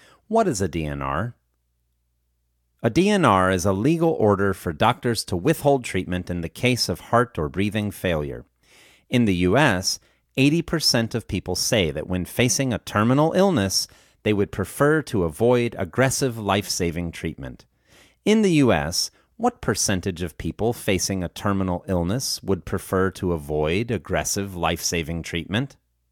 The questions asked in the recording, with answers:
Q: In the U.S., what percentage of people facing a terminal illness would prefer to avoid aggressive life-saving treatment?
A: In the U.S., 80% of people facing a terminal illness would prefer to avoid aggressive life-saving treatment.